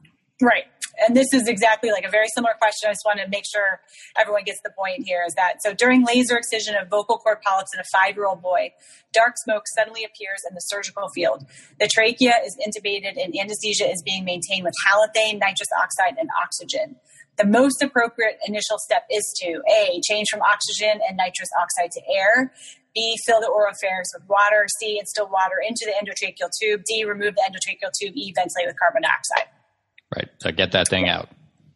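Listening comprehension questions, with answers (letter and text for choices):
During laser excision, dark smoke suddenly appears in surgical field. Trachea intubated, anesthesia maintained w/ halothane, nitrous, oxygen. Most appropriate initial step?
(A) Change gas to air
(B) Fill oropharynx w/ water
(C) Water into ETT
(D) Remove ETT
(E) Ventilate w/ CO2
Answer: (D) Remove ETT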